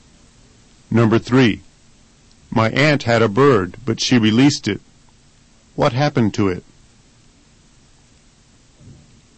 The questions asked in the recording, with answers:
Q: What happened to it?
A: The bird my aunt had went free.